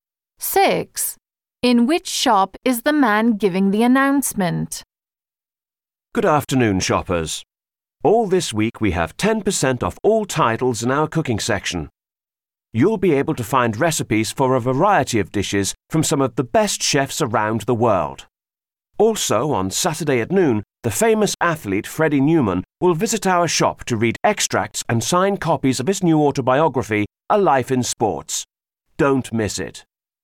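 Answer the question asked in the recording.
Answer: A bookshop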